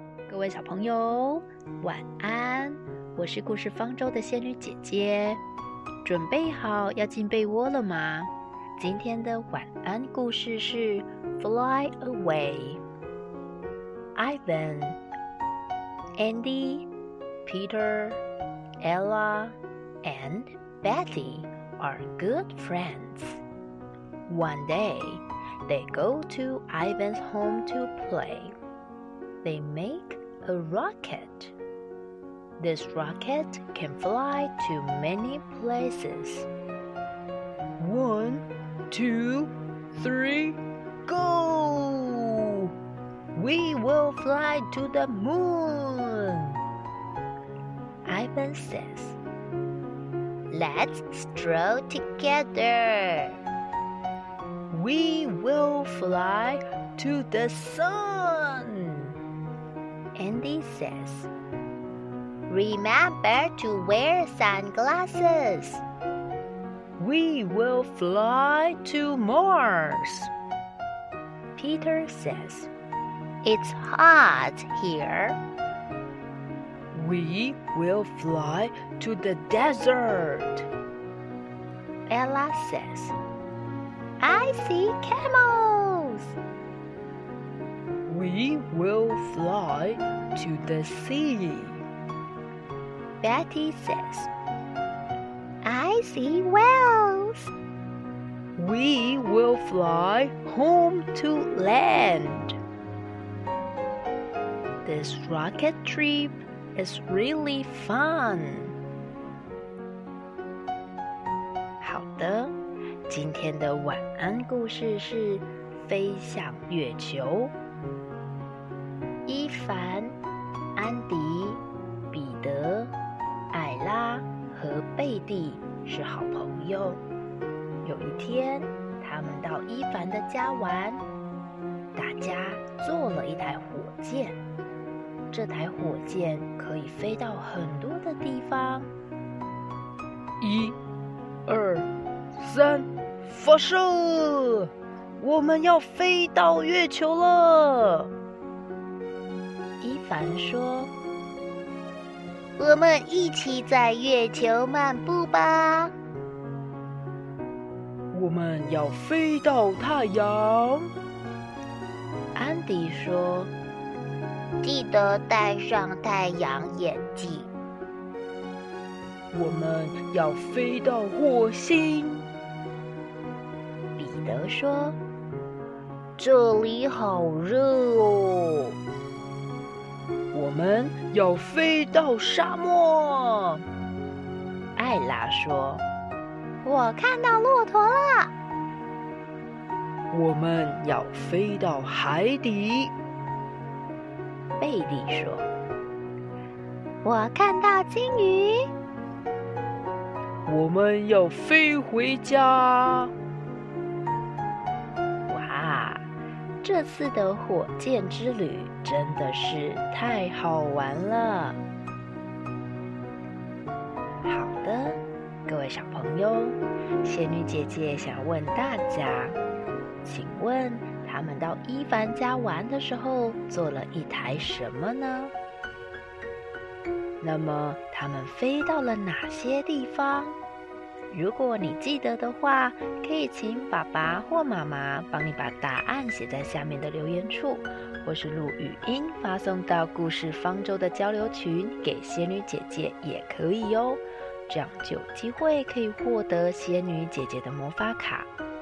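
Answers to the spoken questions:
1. 火箭
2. 月球、太阳、火星、沙漠、海底,最后飞回家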